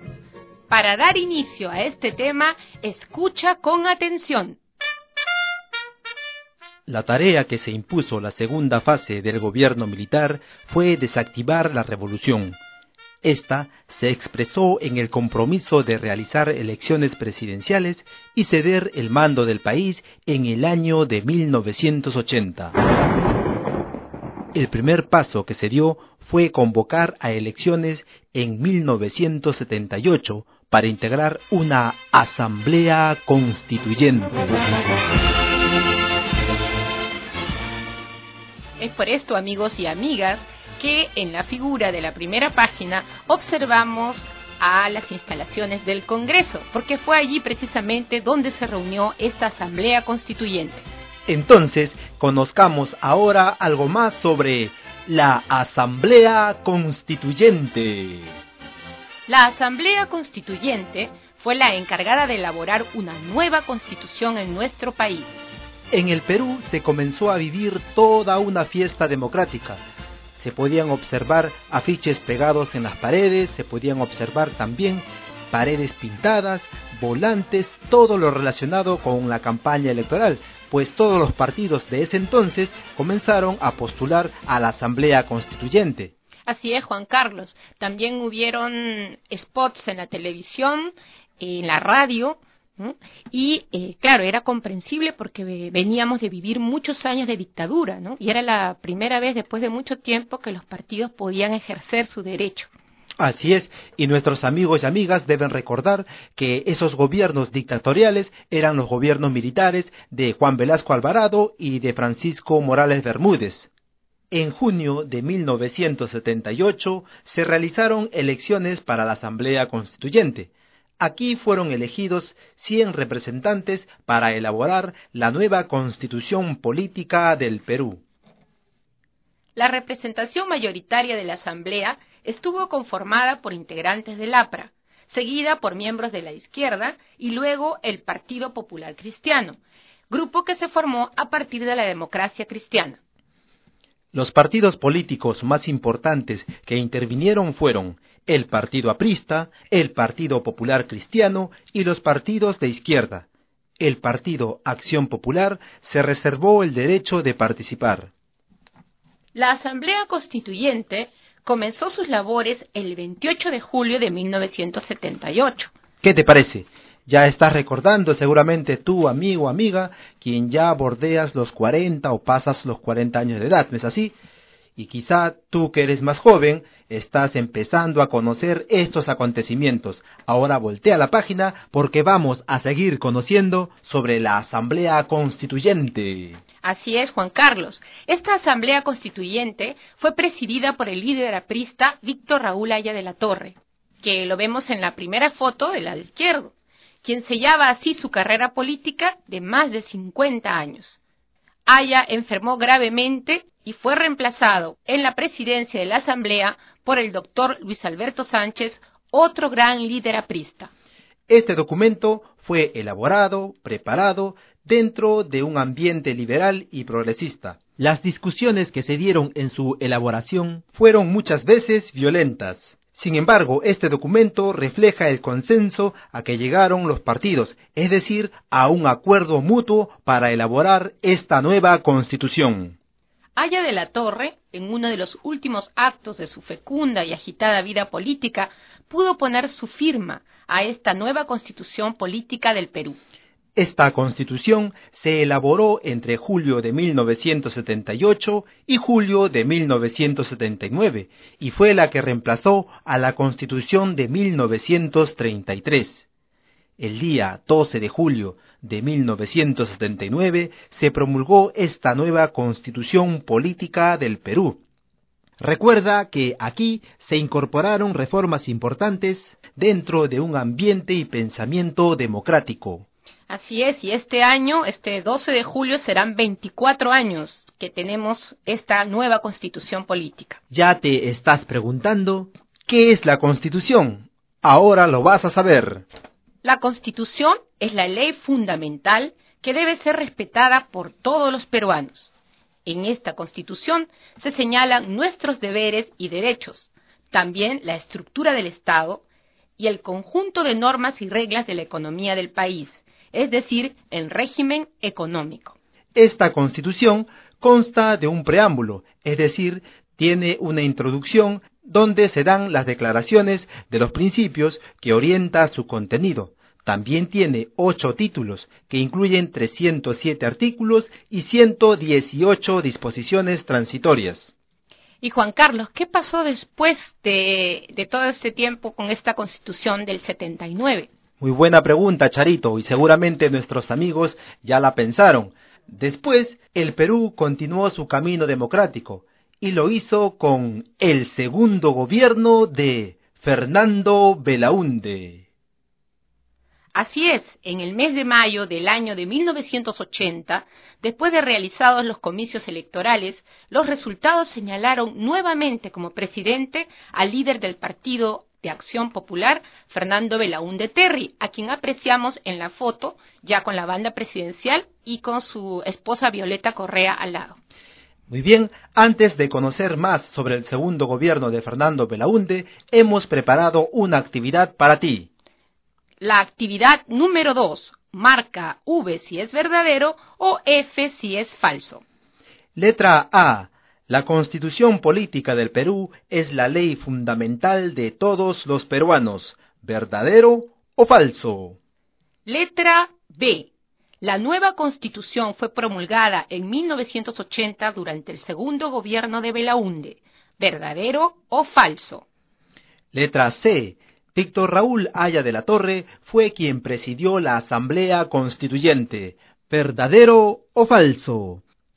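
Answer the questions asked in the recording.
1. Verdadero
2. Falso (se promulgó el 12 de julio de 1979)
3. Verdadero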